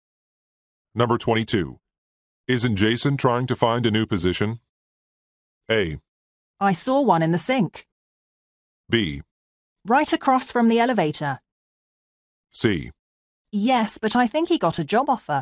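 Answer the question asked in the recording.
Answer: C: Yes, but I think he got a job offer.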